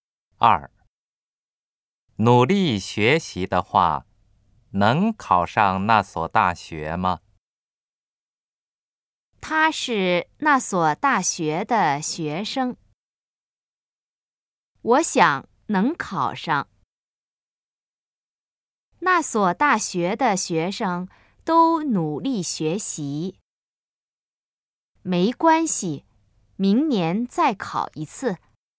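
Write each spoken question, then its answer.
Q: 努力学习的话,能考上那所大学吗?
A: B: 我想能考上。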